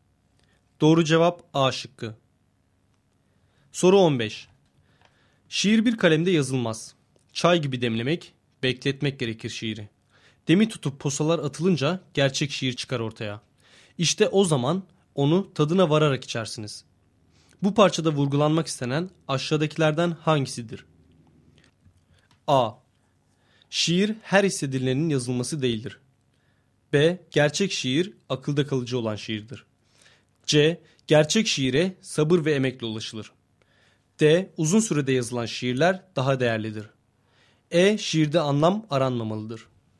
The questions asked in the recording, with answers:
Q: Bu parçada vurgulanmak istenen aşağıdakilerden hangisidir?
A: Doğru cevap C şıkkı.